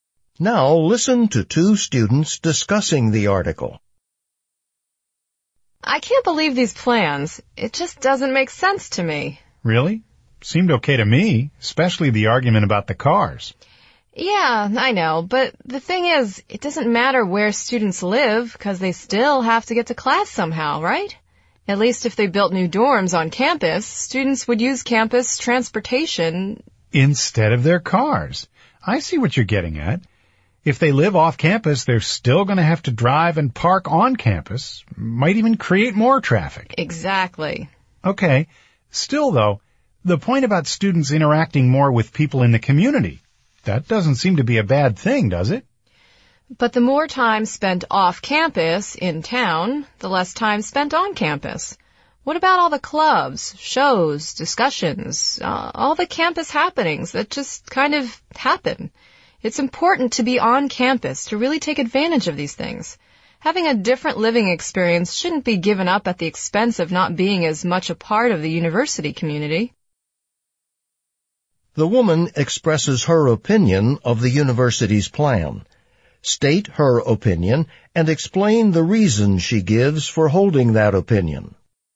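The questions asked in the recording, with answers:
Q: The woman expresses her opinion of the university's plan. State her opinion and explain the reason she gives for holding that opinion.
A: She disagrees with the plan: students living off campus will still drive and park on campus, which may add traffic, and they will spend less time on campus and miss out on campus activities and community.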